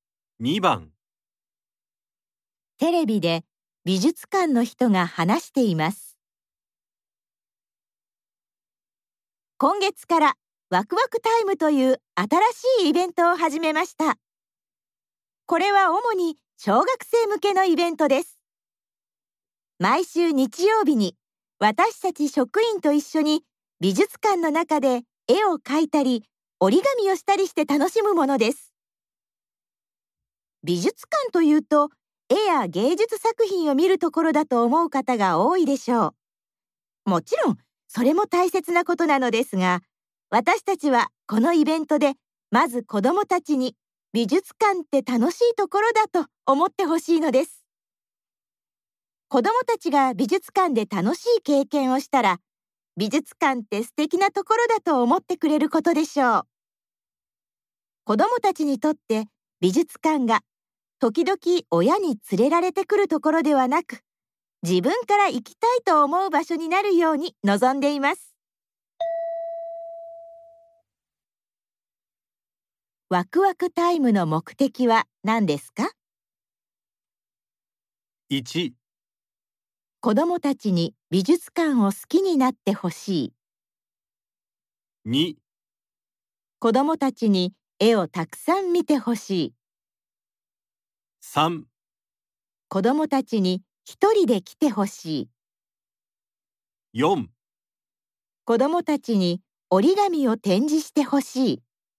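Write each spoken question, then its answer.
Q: ワクワクタイムの目的は何ですか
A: 1: 子どもたちに美術館を好きになってほしい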